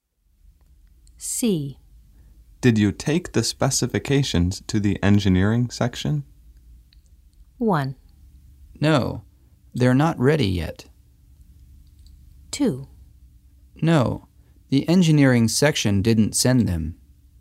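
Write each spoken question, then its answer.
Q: Did you take the specifications to the engineering section?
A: 1: No, they're not ready yet.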